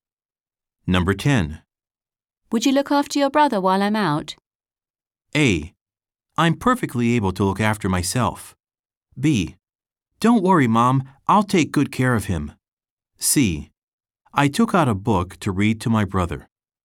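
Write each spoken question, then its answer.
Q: Would you look after your brother while I'm out?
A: B: Don't worry, Mom, I'll take good care of him.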